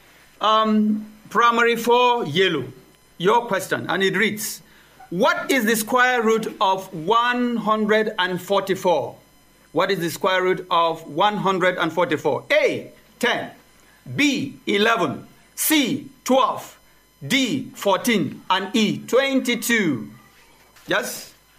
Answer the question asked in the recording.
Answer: C, 12.